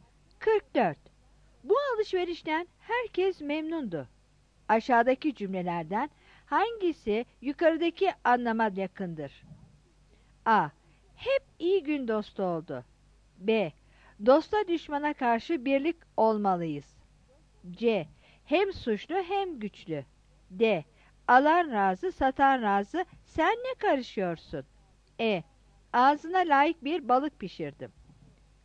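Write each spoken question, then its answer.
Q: Aşağıdaki cümlelerden hangisi yukarıdaki anlama yakındır?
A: D: Alan razı, satan razı, sen ne karışıyorsun?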